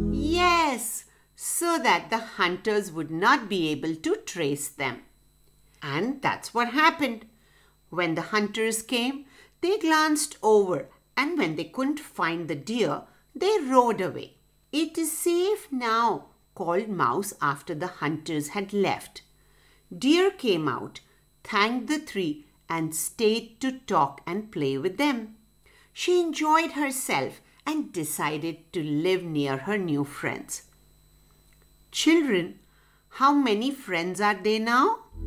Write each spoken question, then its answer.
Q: Children, how many friends are they now?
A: That's right, now they are four friends.